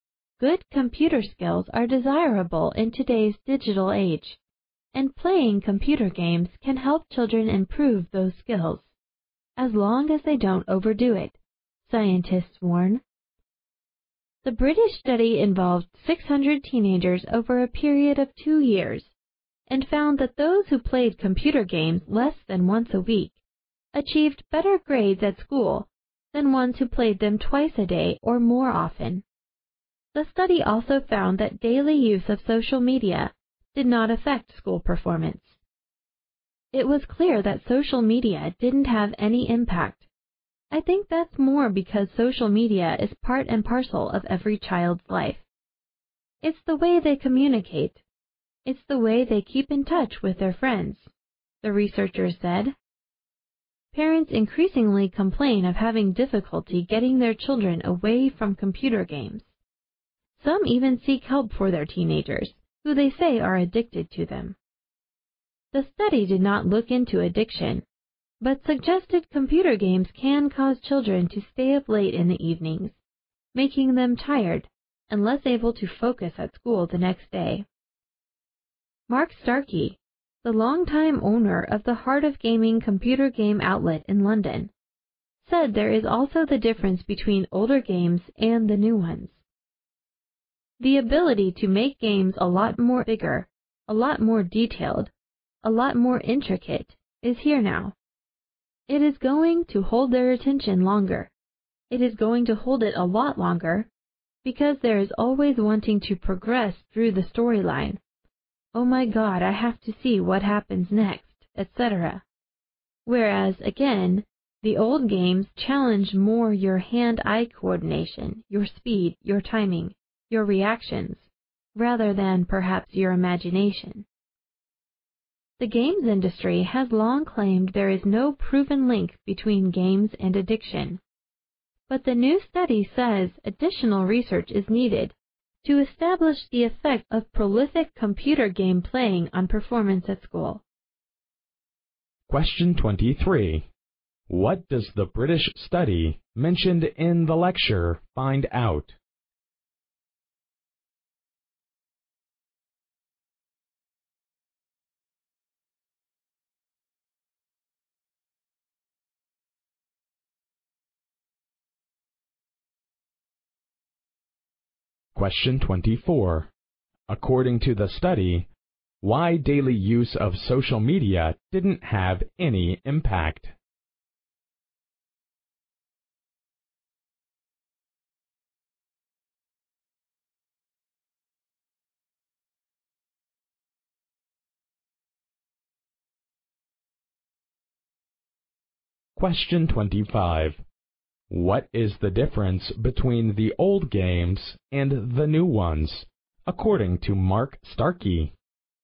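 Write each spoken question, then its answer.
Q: What does the British study mentioned in the lecture find out?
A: Teenagers who played computer games less than once a week got better school grades than those who played twice a day or more.

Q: According to the study, why daily use of social media didn't have any impact?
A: Because social media is part of every child's life; it's how they communicate and keep in touch with friends.

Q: What is the difference between the old games and the new ones, according to Mark Starkey?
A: New games are bigger, more detailed and more intricate, with storylines that hold attention longer; old games tested hand-eye coordination, speed, timing and reactions rather than imagination.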